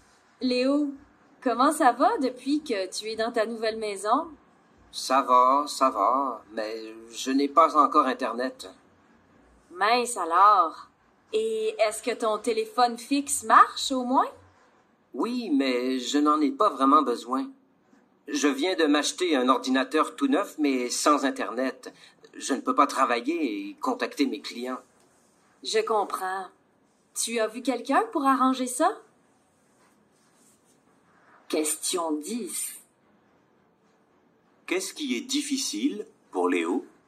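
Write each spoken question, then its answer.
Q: Qu'est-ce qui est difficile pour Léo?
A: Il n'a pas encore Internet, donc il ne peut pas travailler ni contacter ses clients.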